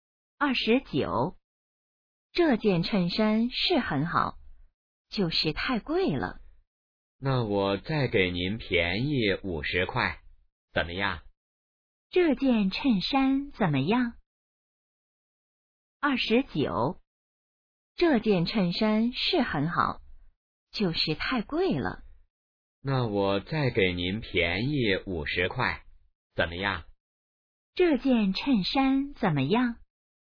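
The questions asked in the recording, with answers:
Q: 这件衬衫怎么样?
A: 很好,但是太贵了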